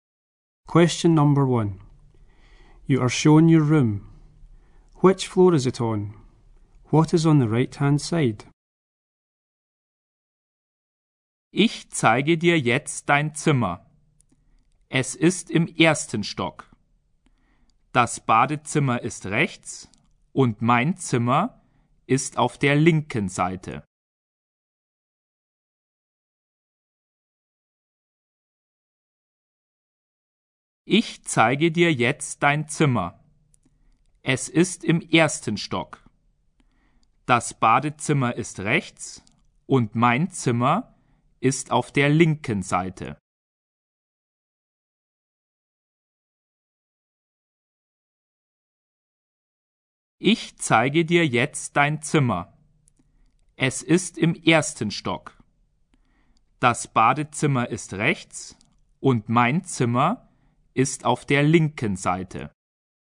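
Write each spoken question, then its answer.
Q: Which floor is it on?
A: The first floor

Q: What is on the right-hand side?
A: The bathroom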